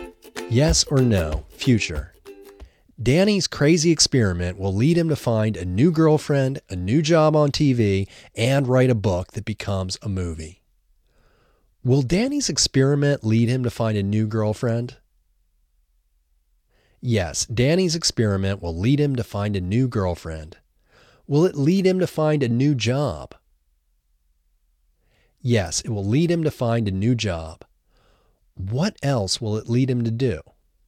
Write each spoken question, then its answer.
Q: Will Danny's experiment lead him to find a new girlfriend?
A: Yes, Danny's experiment will lead him to find a new girlfriend.